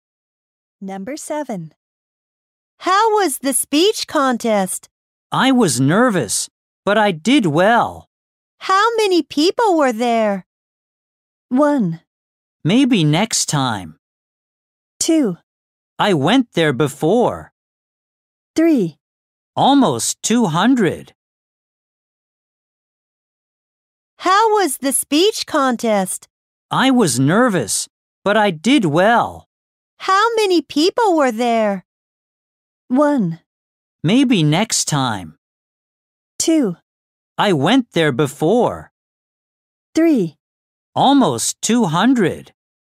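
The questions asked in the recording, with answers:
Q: How many people were there?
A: 3: Almost 200.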